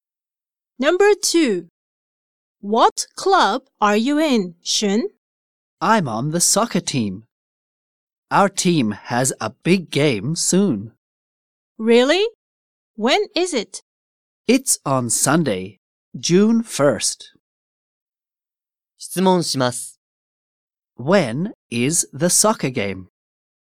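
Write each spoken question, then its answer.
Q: When is the soccer game?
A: Sunday, June 1st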